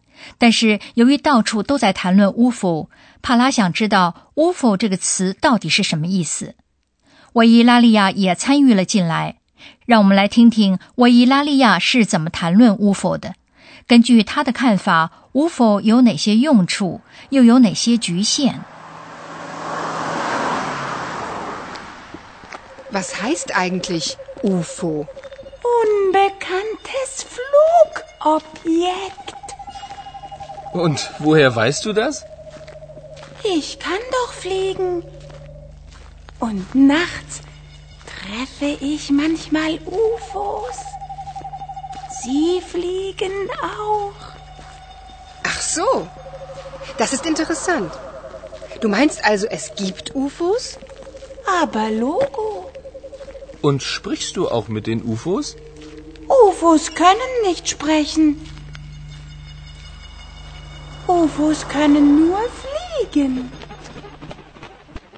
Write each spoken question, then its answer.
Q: 根据他的看法,巫符有哪些用处,又有哪些局限?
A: 对维伊拉利亚来说是很清楚的,那就是 UFO 不会 sprechen, 说话。